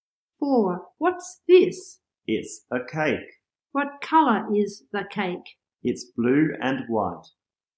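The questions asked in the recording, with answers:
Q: What colour is the cake?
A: Blue and white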